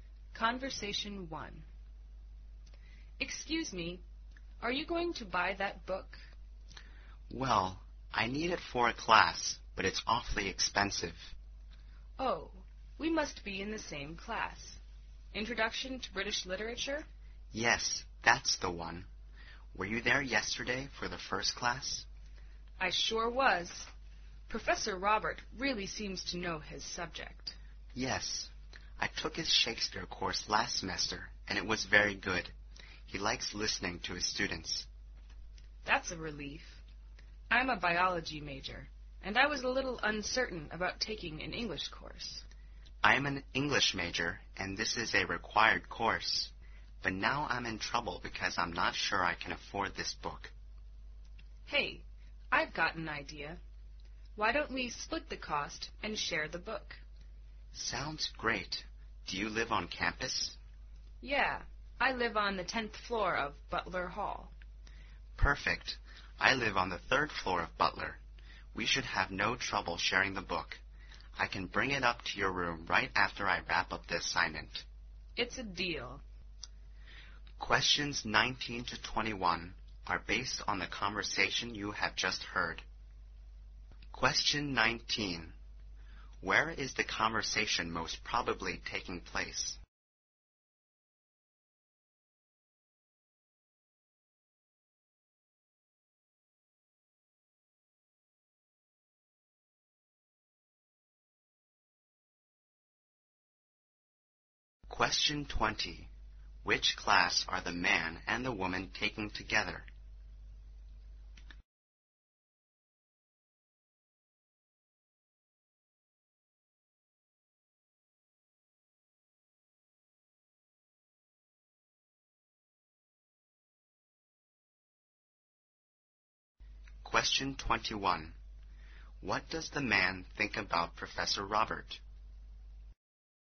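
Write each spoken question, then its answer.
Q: Where is the conversation most probably taking place?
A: In a bookstore

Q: Which class are the man and the woman taking together?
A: Introduction to British Literature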